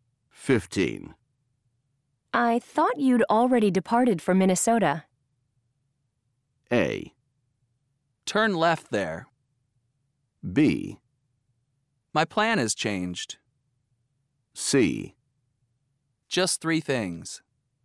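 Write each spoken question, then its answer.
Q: I thought you'd already departed for Minnesota.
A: B: My plan has changed.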